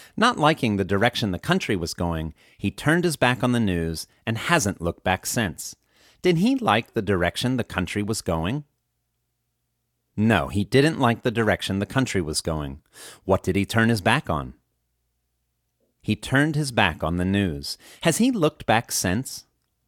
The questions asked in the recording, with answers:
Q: What did he turn his back on?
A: He turned his back on the news.